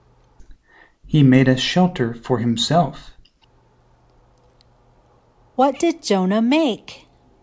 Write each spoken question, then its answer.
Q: What did Jonah make?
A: Jonah made a shelter.